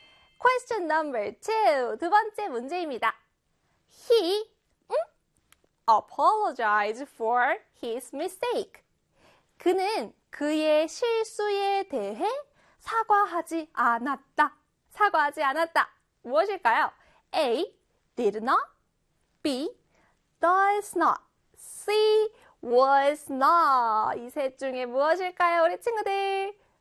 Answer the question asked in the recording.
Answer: 바로 A의 did not이었어요.